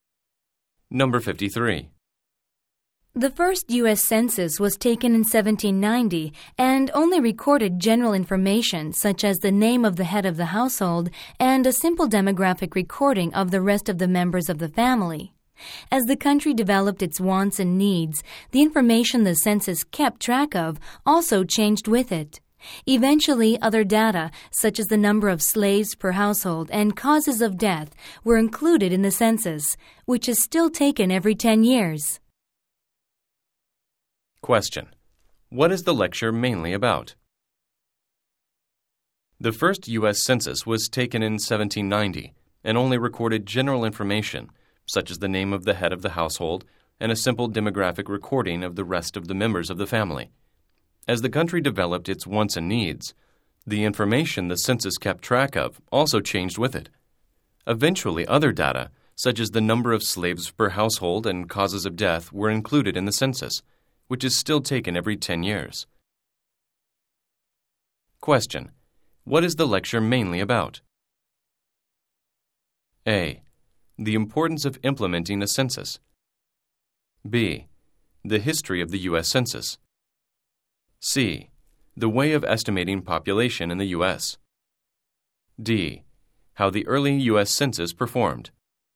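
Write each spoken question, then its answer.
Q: What is the lecture mainly about?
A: B: The history of the U.S. Census.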